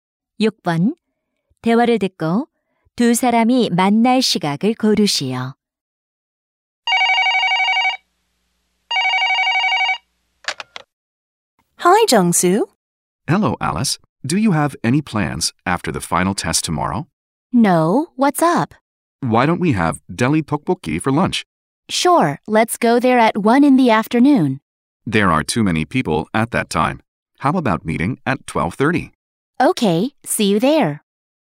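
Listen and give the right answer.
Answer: 12시 30분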